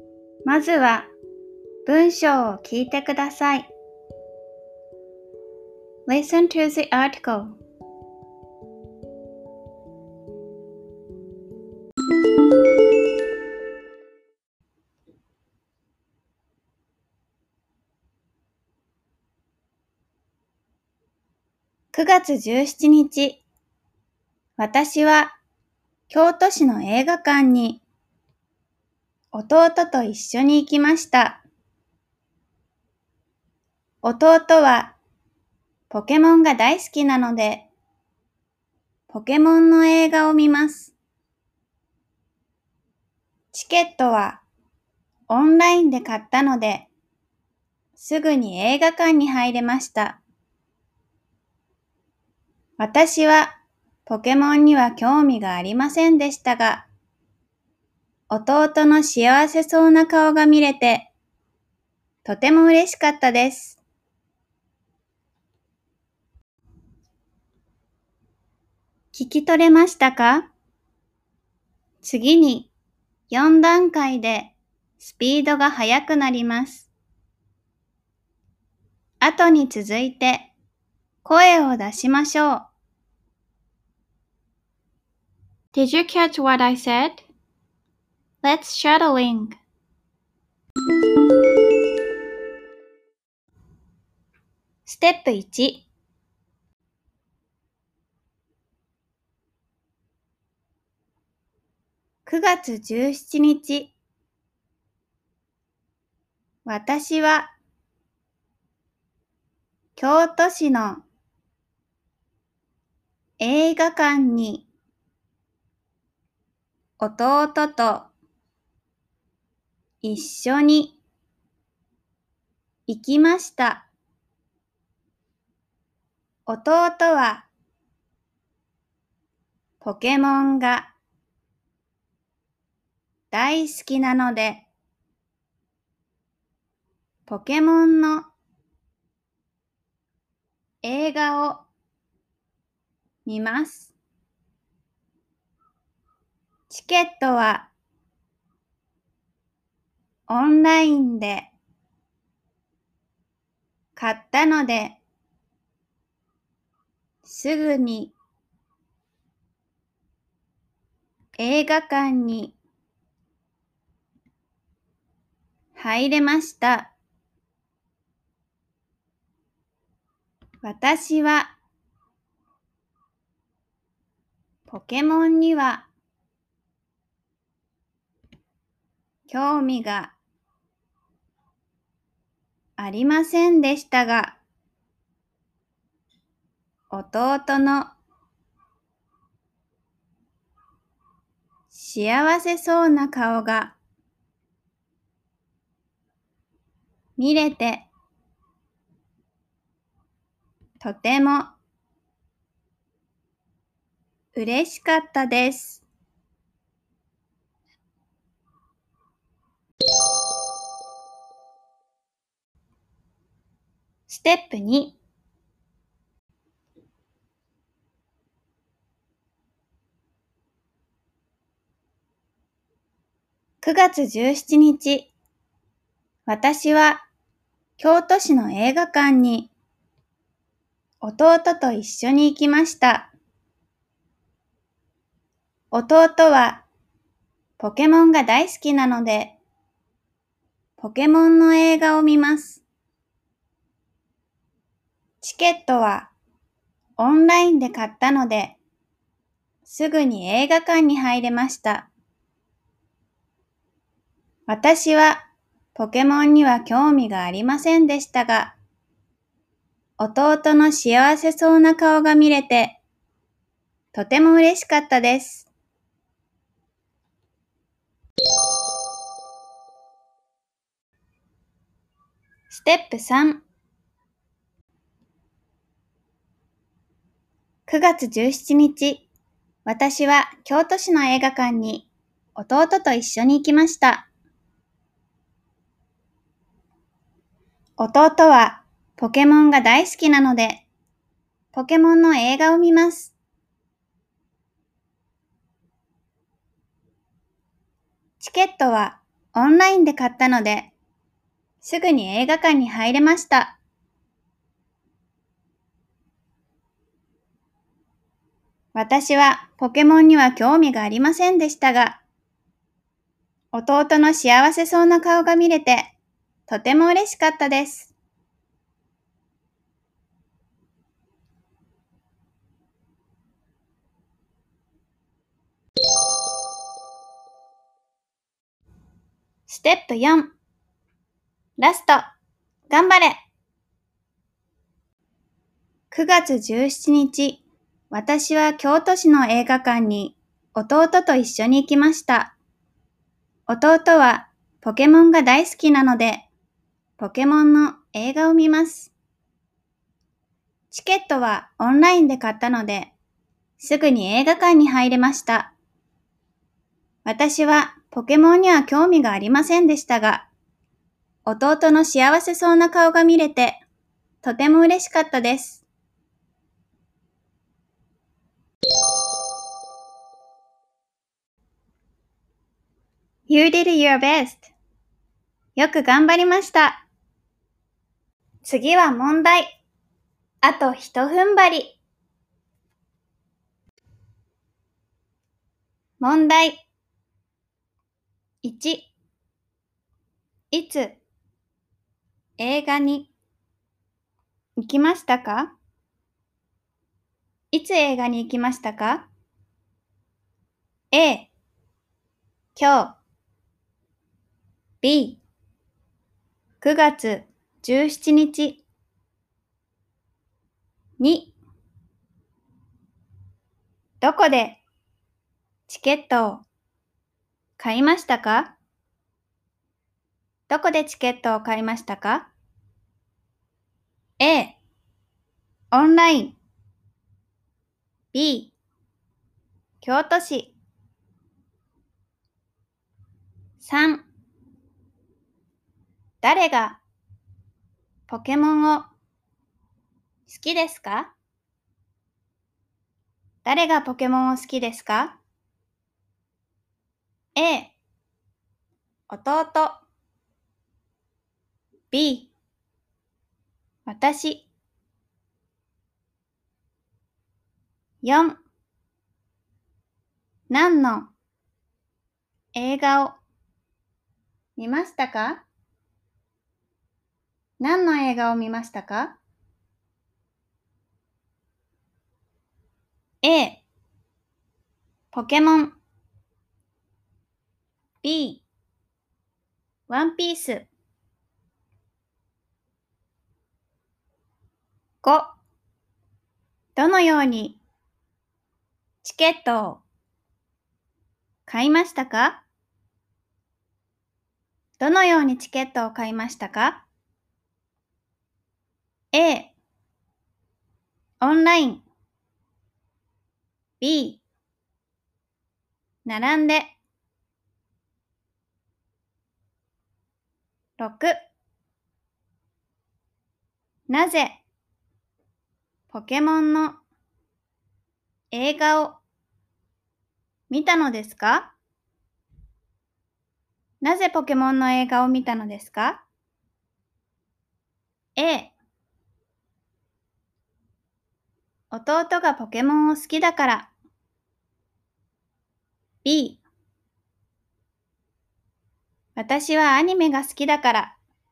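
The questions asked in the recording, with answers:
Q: いつ映画に行きましたか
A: B: 9月17日

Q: どこでチケットを買いましたか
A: A: オンライン

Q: 誰がポケモンを好きですか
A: A: 弟

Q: 何の映画を見ましたか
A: A: ポケモン

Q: どのようにチケットを買いましたか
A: A: オンライン

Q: なぜポケモンの映画を見たのですか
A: A: 弟がポケモンを好きだから。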